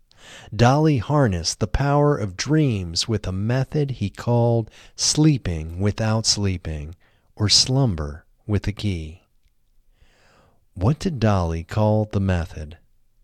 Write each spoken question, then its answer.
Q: What did Dali call the method?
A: Dali called the method sleeping without sleeping, or slumber with a key.